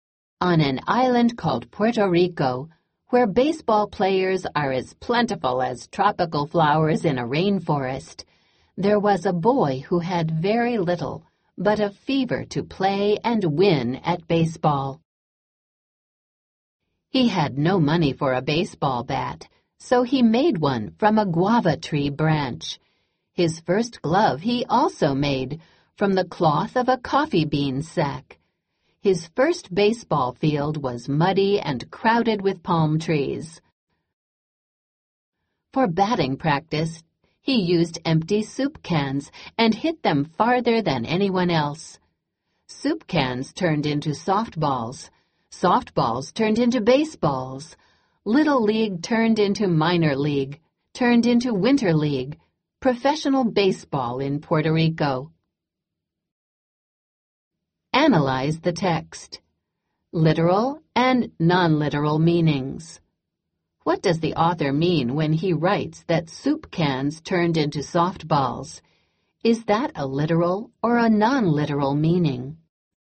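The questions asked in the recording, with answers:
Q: What does the author mean when he writes that soup cans turned into softballs?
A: It is not literal: as he grew, he moved from hitting soup cans to playing with softballs.

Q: Is that a literal or a non-literal meaning?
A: Non-literal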